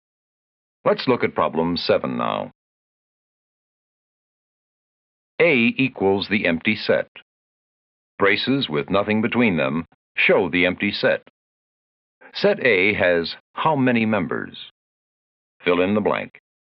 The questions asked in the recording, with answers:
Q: Set A has how many members?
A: I'll bet you wrote 0, and that's right.